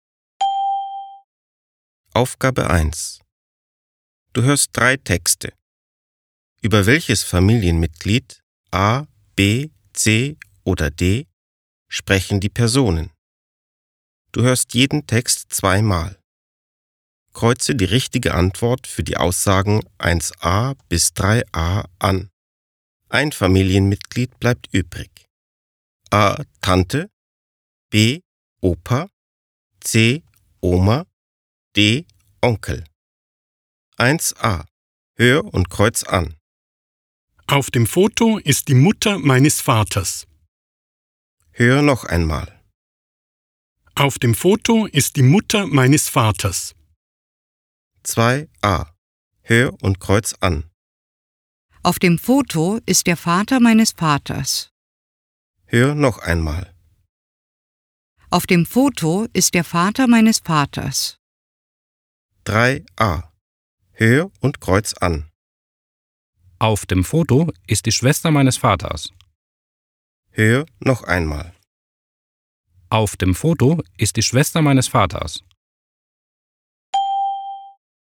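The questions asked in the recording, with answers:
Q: Über welches Familienmitglied A, B, C oder D sprechen die Personen?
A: C: Oma

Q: Über welches Familienmitglied A, B, C oder D sprechen die Personen?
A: B: Opa

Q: Über welches Familienmitglied A, B, C oder D sprechen die Personen?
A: A: Tante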